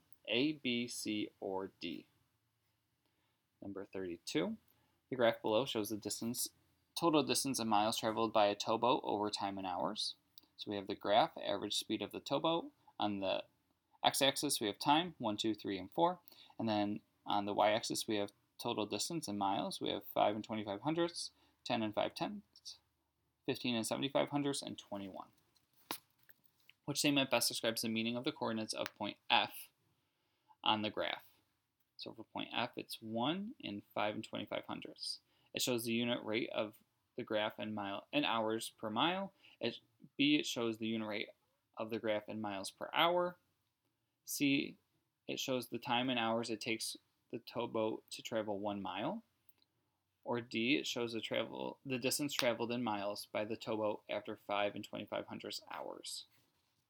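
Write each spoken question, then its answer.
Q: Which statement best describes the meaning of the coordinates of point F on the graph?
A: B: It shows the unit rate of the graph in miles per hour.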